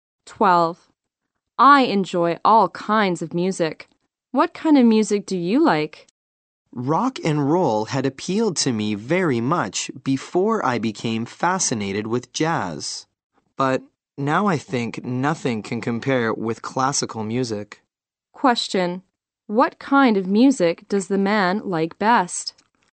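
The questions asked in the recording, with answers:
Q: What kind of music does the man like best?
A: Classical music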